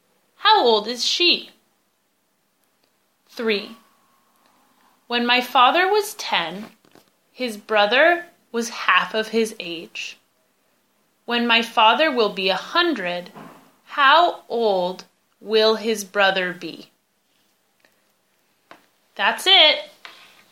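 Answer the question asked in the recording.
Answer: 95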